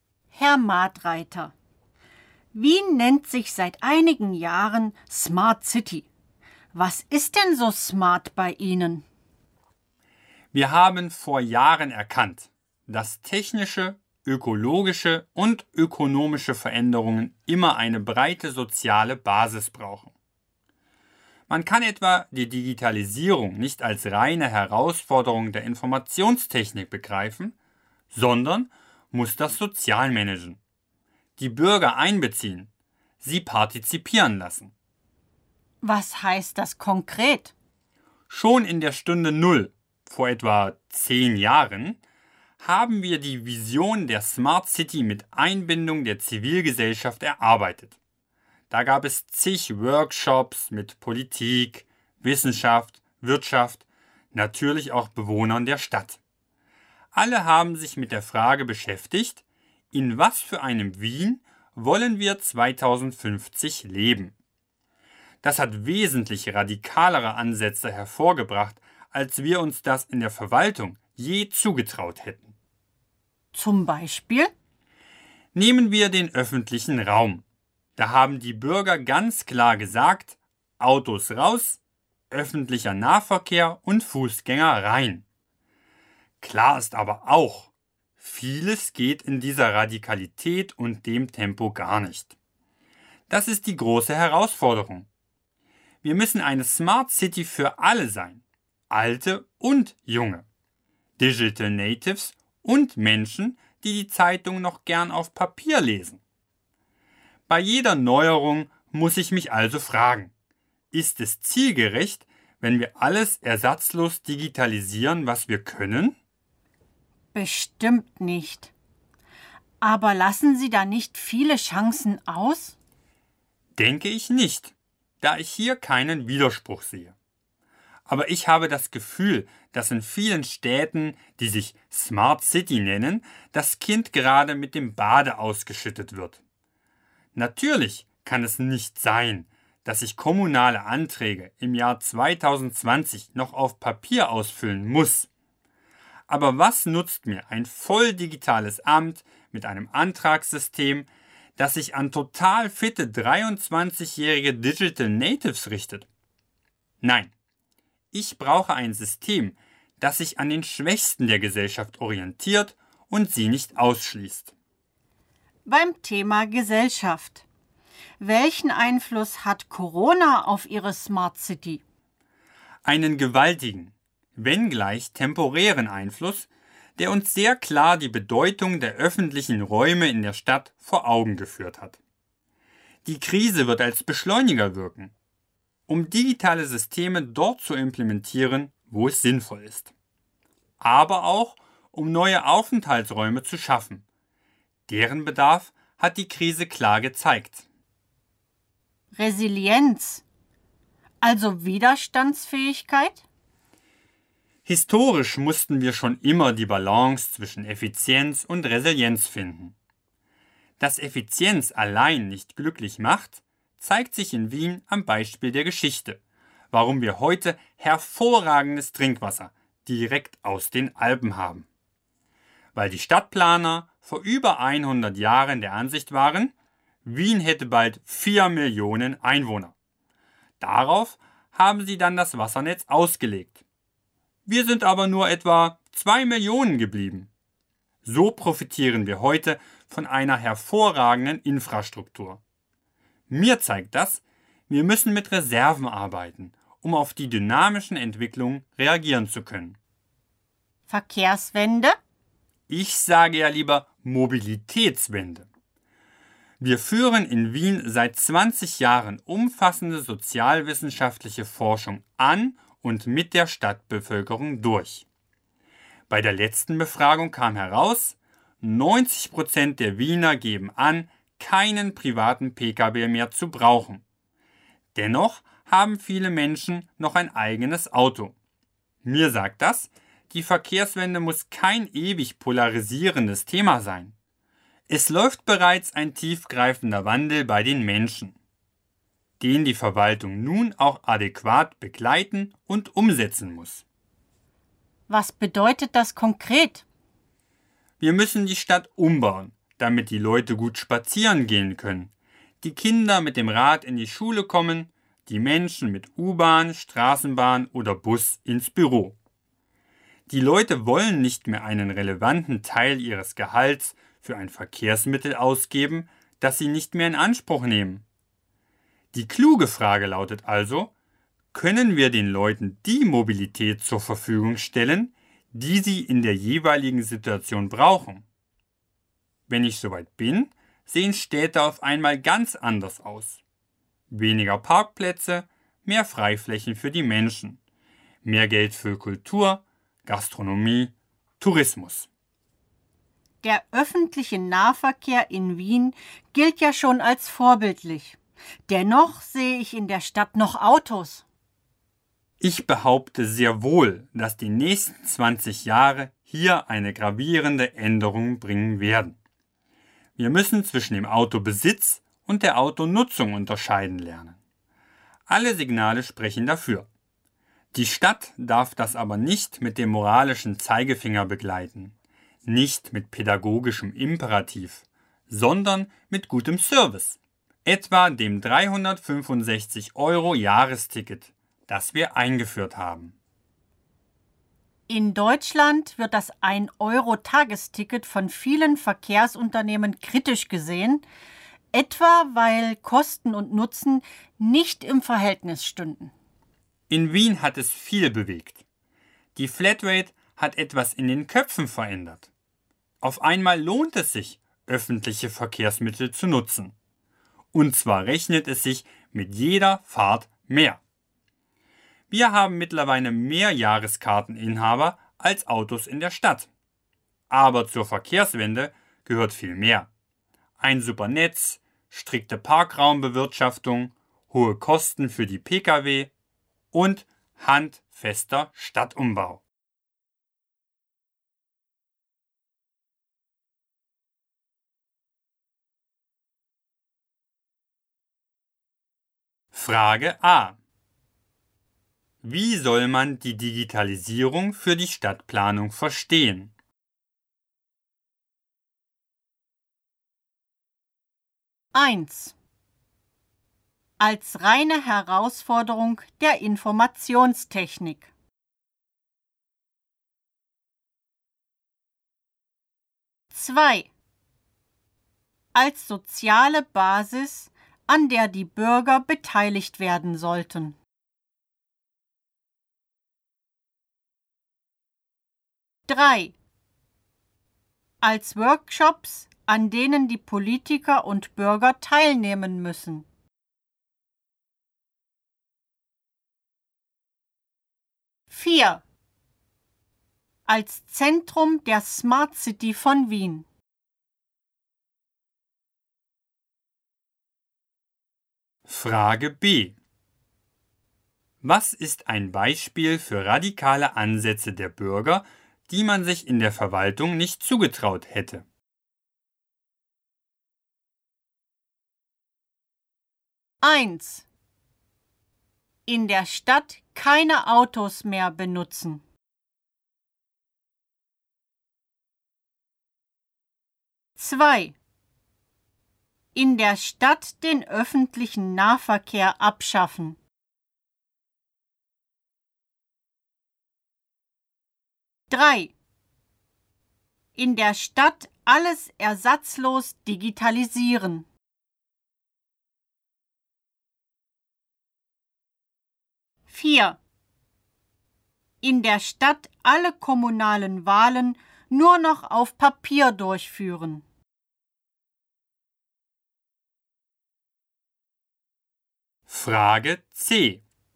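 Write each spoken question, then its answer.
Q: Wie soll man die Digitalisierung für die Stadtplanung verstehen?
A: 2: Als soziale Basis, an der die Bürger beteiligt werden sollten.

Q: Was ist ein Beispiel für radikale Ansätze der Bürger, die man sich in der Verwaltung nicht zugetraut hätte?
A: 1: In der Stadt keine Autos mehr benutzen.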